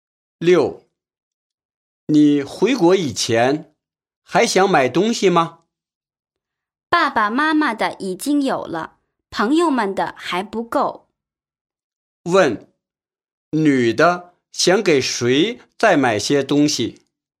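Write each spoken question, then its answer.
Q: 问,女的想给谁再买些东西?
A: 朋友们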